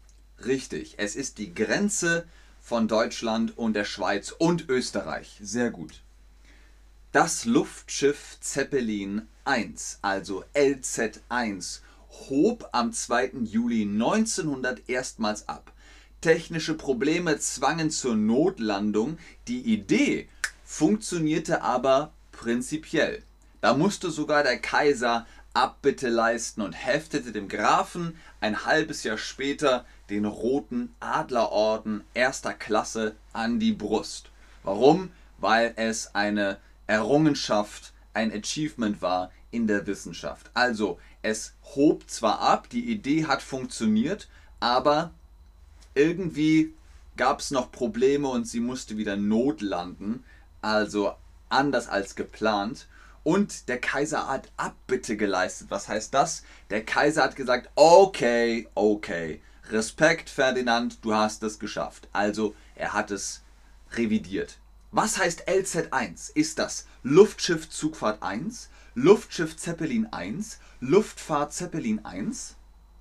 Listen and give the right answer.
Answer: Richtig. Die LZ1 ist das Luftschiff Zeppelin 1